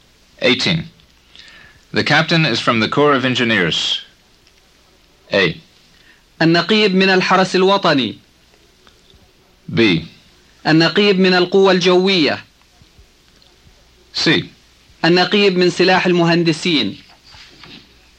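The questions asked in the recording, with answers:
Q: The captain is from the Corps of Engineers.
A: C: النقيب من سلاح المهندسين.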